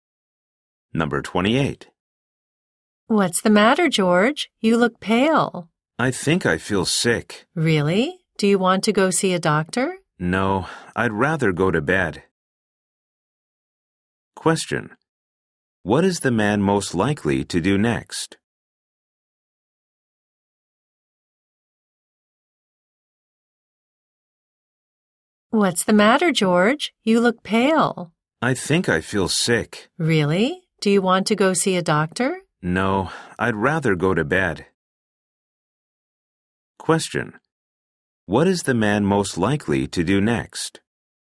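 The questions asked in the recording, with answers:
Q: What is the man most likely to do next?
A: Go to bed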